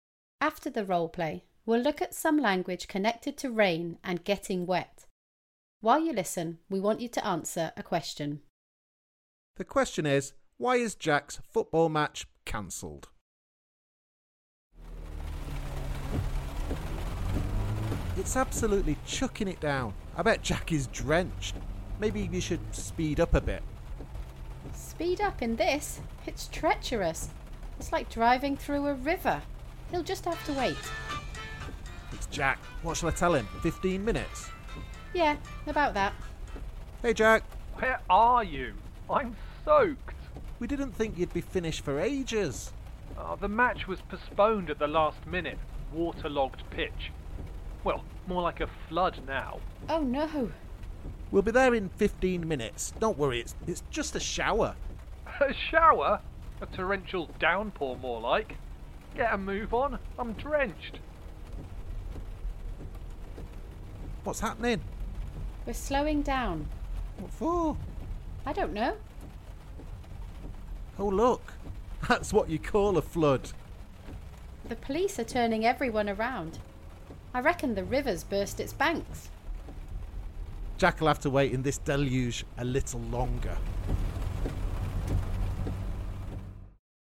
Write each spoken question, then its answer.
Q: why is Jack's football match cancelled?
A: No, the match was cancelled or postponed because of a waterlogged pitch.